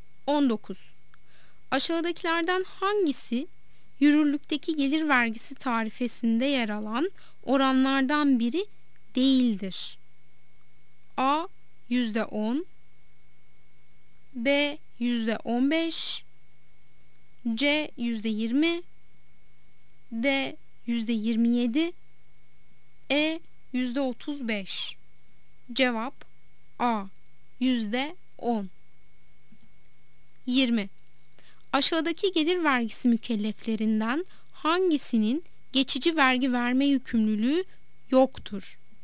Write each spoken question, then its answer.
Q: Aşağıdakilerden hangisi yürürlükteki gelir vergisi tarifesinde yer alan oranlardan biri değildir?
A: Cevap A. %10